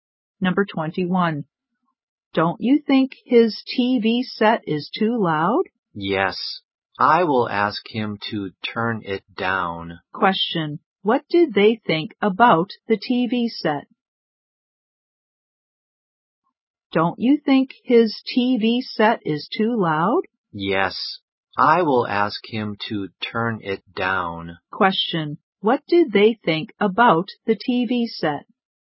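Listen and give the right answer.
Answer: It was too loud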